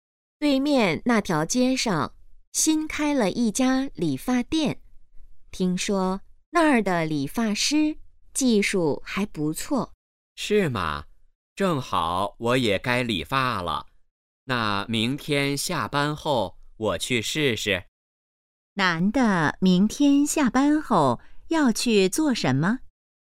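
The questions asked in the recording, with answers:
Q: 男的明天下班后要去做什么?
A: 理发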